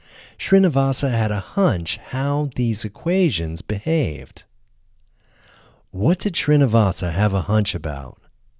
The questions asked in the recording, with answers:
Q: What did Srinivasa have a hunch about?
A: Srinivasa had a hunch about how these equations behaved.